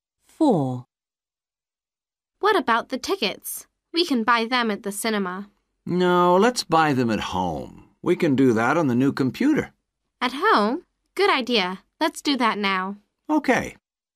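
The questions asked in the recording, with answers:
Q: What about the tickets?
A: buy them at home on the computer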